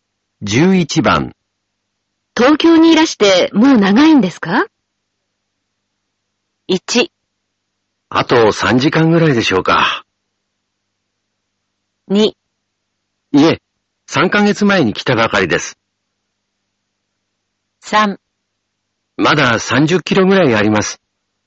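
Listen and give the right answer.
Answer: 2: いえ、3ヶ月前に来たばかりです。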